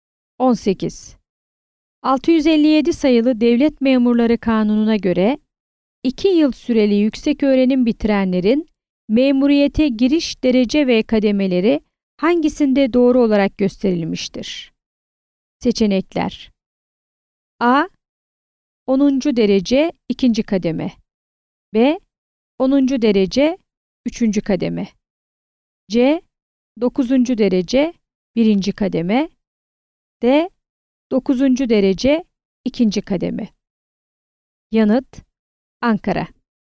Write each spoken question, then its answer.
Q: 657 sayılı Devlet Memurları Kanunu'na göre 2 yıl süreli yüksek öğrenim bitirenlerin memuriyete giriş derece ve kademeleri hangisinde doğru olarak gösterilmiştir?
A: Yanıt: Ankara.